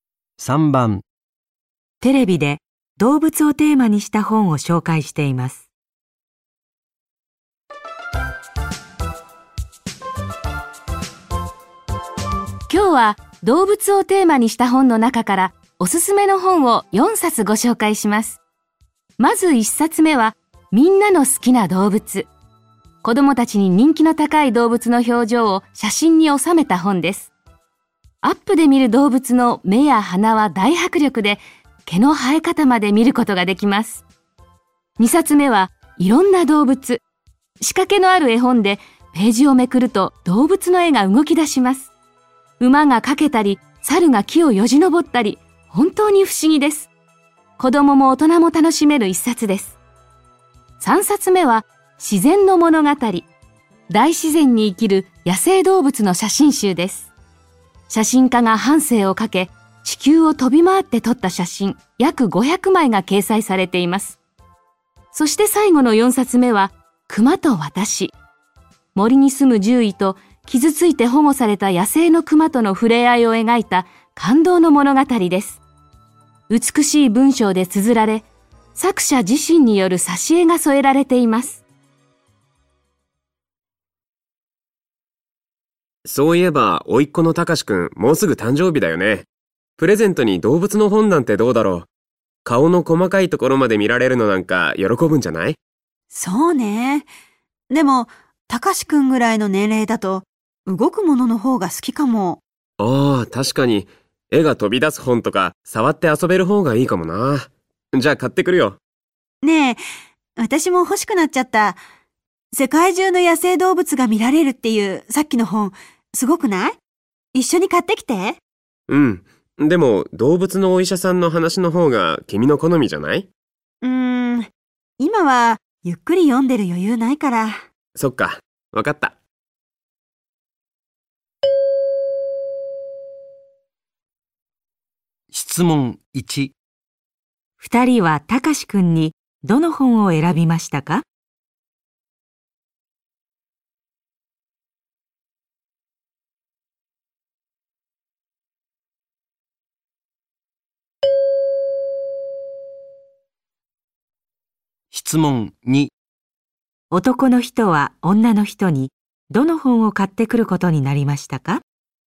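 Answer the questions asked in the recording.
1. いろんな動物
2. 自然の物語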